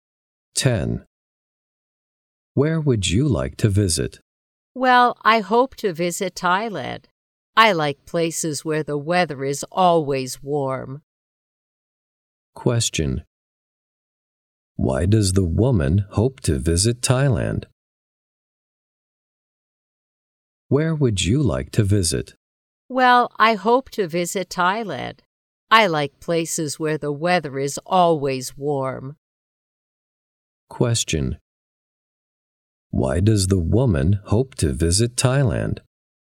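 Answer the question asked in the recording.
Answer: She likes places where the weather is always warm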